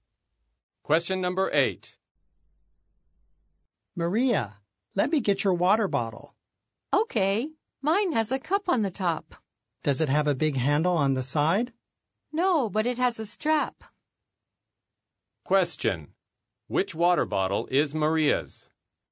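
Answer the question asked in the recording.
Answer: The one with a cup on the top and a strap, but no big handle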